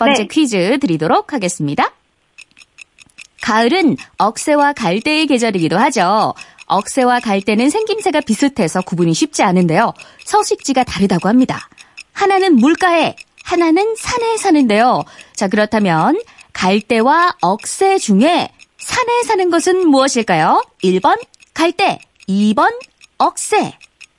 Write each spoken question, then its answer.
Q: 자, 그렇다면 갈대와 억새 중에 산에 사는 것은 무엇일까요?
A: 2번 억새. 정답입니다.